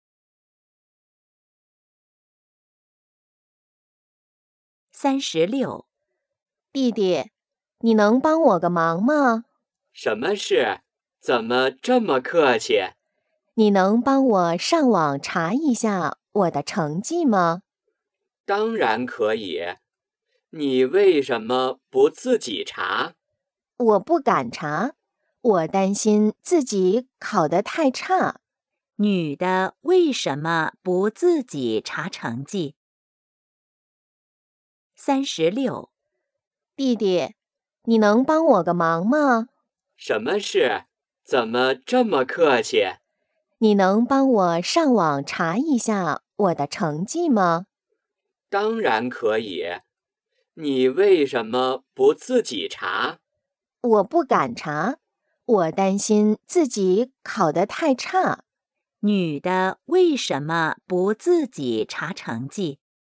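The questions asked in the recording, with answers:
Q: 女的为什么不自己查成绩?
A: 担心自己考得太差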